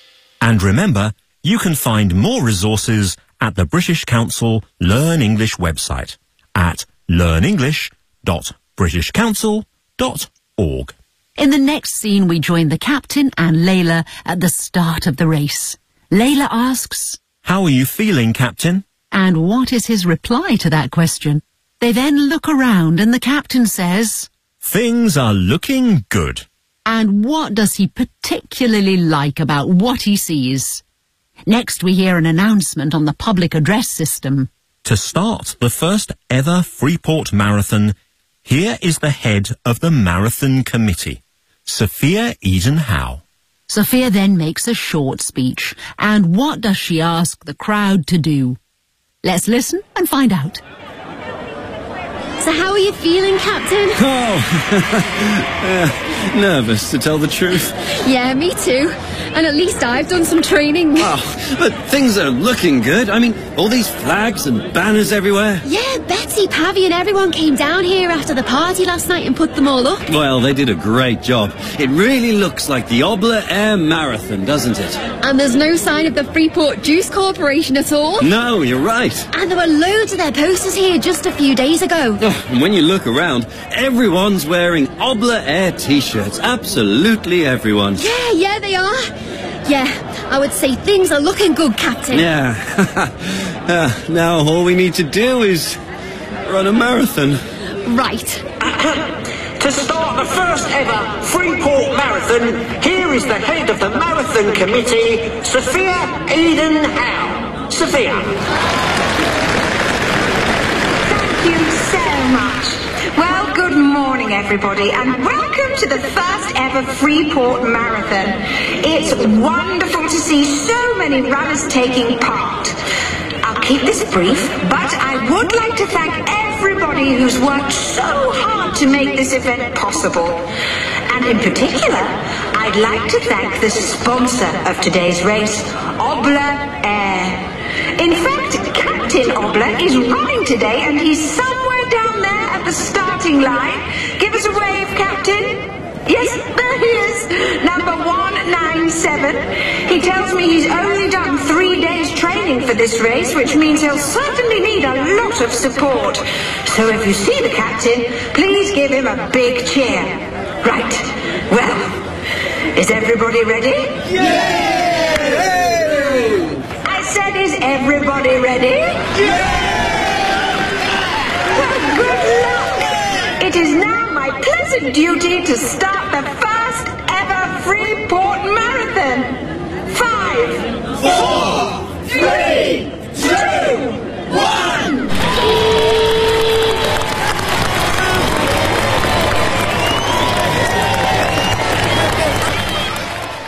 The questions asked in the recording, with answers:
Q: And what is his reply to that question?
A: nervous, to tell the truth.

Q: And what does he particularly like about what he sees?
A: all these flags and banners everywhere.

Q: And what does she ask the crowd to do?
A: if you see the captain, please give him a big cheer.